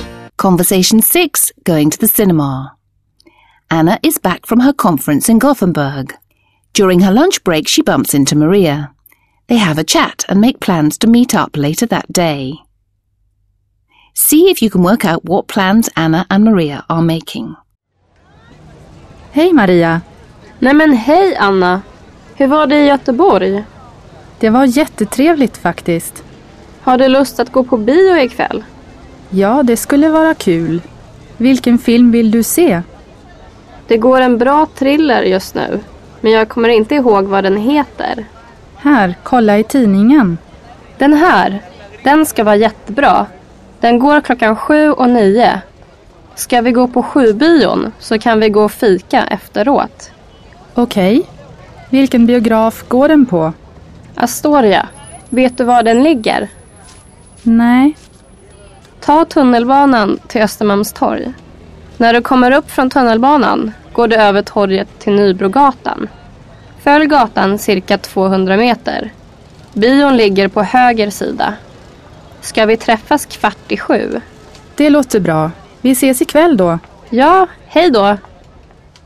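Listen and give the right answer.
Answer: To see a thriller at the 7 o'clock showing at the Astoria cinema that evening (meeting at 7:15), then have coffee afterwards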